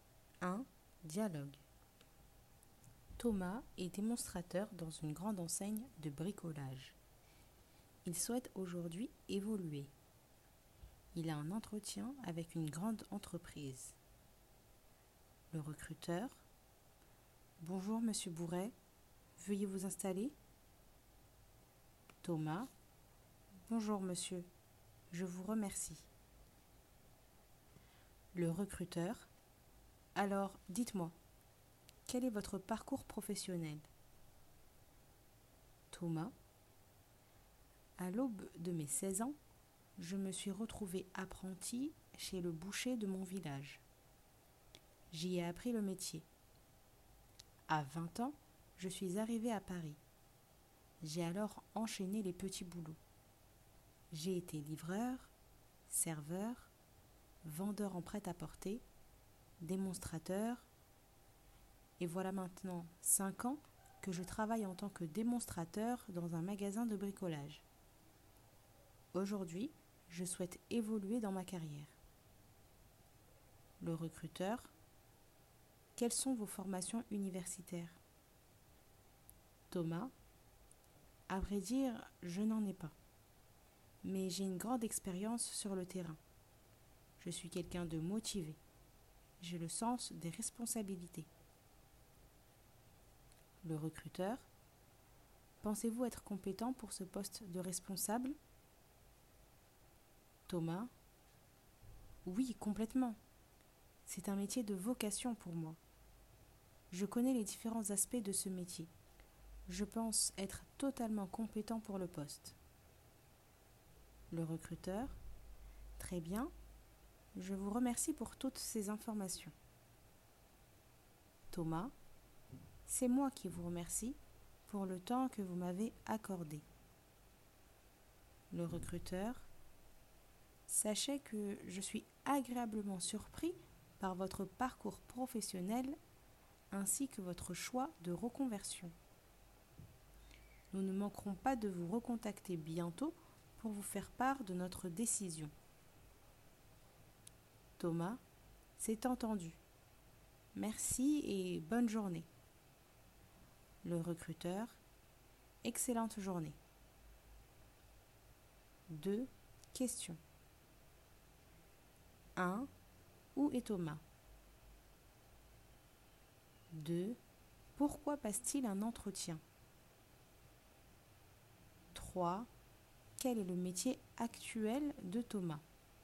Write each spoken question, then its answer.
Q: Où est Thomas?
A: Il a un entretien d'embauche.

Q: Pourquoi passe-t-il un entretien?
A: Il souhaite évoluer dans sa carrière professionnelle.

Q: Quel est le métier actuel de Thomas?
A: Il est démonstrateur.